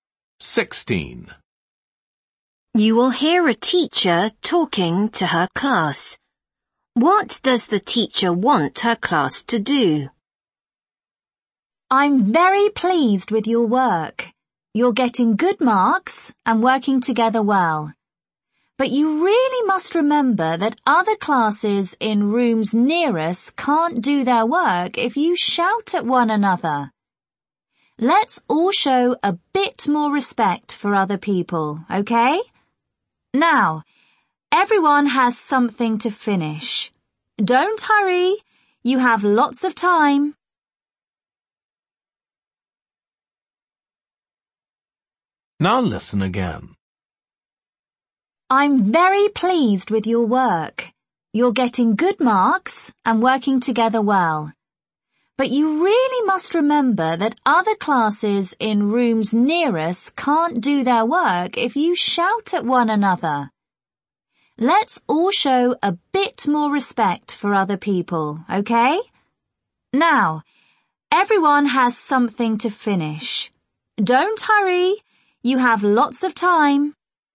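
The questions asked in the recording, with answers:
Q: What does the teacher want her class to do?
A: Be quieter and not shout, out of respect for other classes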